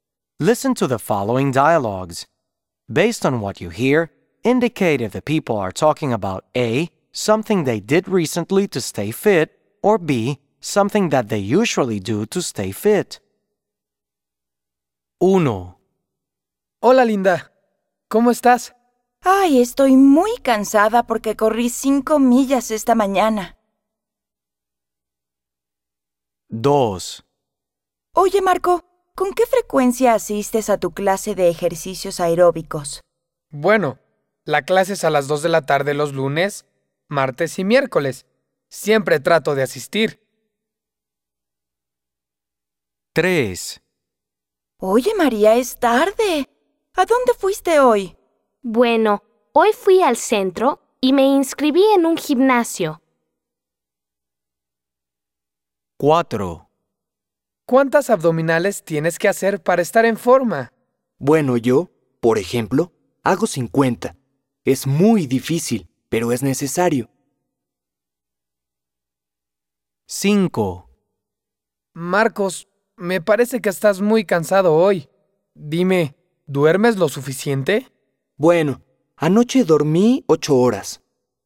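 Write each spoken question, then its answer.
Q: Based on what you hear, indicate if the people are talking about A, something they did recently to stay fit, or B, something that they usually do to stay fit.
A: A: something they did recently to stay fit

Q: Based on what you hear, indicate if the people are talking about A, something they did recently to stay fit, or B, something that they usually do to stay fit.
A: B: something that they usually do to stay fit

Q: Based on what you hear, indicate if the people are talking about A, something they did recently to stay fit, or B, something that they usually do to stay fit.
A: A: something they did recently to stay fit

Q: Based on what you hear, indicate if the people are talking about A, something they did recently to stay fit, or B, something that they usually do to stay fit.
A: B: something that they usually do to stay fit

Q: Based on what you hear, indicate if the people are talking about A, something they did recently to stay fit, or B, something that they usually do to stay fit.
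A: A: something they did recently to stay fit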